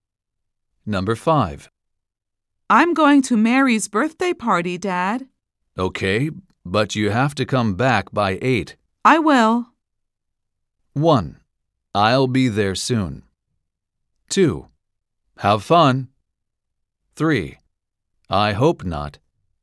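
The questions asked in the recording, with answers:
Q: I will.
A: 2: Have fun.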